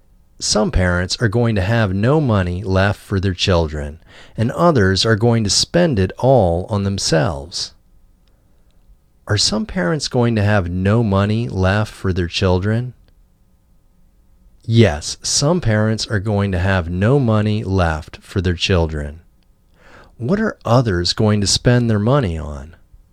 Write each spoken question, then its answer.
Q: What are others going to spend their money on?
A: Others are going to spend their money all on themselves.